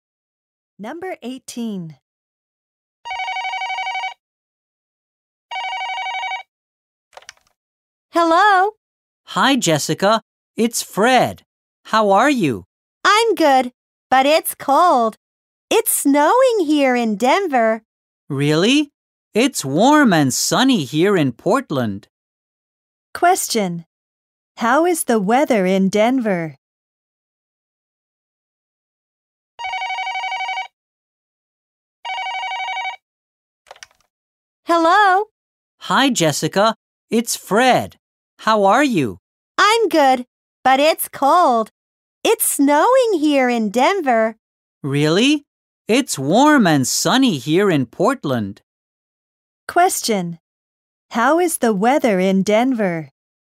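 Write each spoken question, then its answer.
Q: How is the weather in Denver?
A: Cold and snowy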